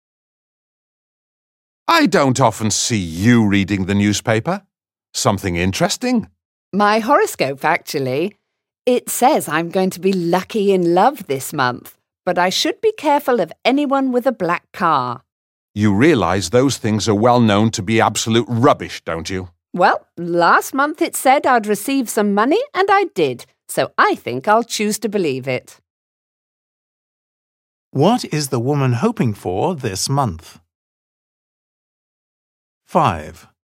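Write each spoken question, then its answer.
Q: What is the woman hoping for this month?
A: to be lucky in love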